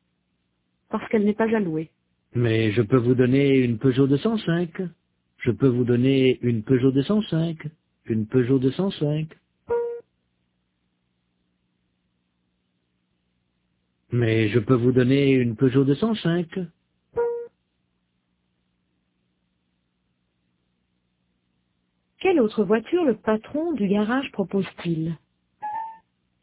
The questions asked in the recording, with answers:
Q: Quelle autre voiture le patron du garage propose-t-il?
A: Une Peugeot 205.